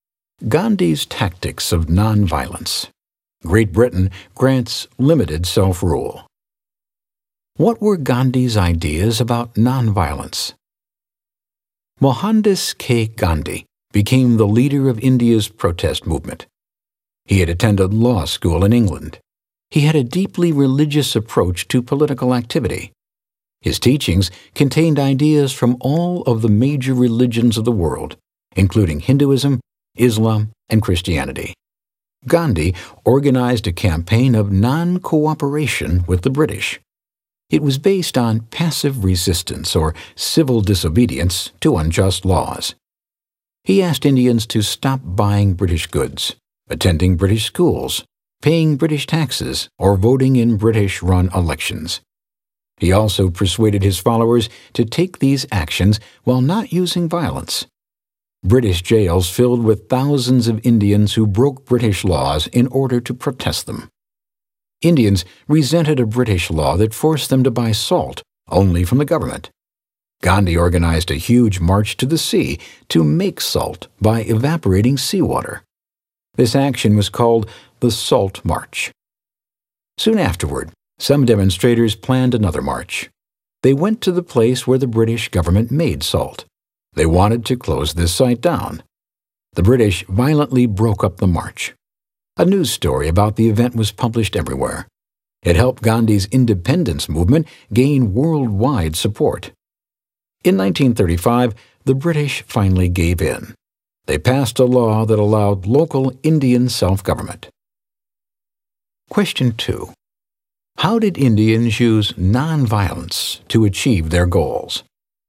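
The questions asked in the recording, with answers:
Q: How did Indians use nonviolence to achieve their goals?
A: Through non-cooperation and civil disobedience: boycotting British goods, schools, taxes and elections, and the Salt March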